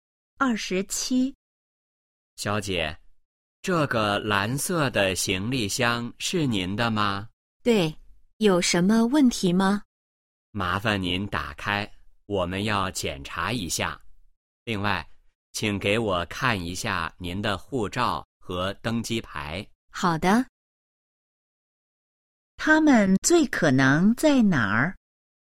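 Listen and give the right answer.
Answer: 机场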